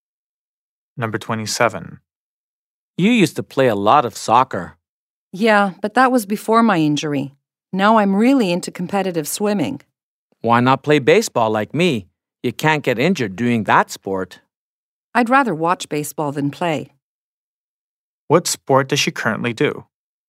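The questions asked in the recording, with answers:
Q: What sport does she currently do?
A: Competitive swimming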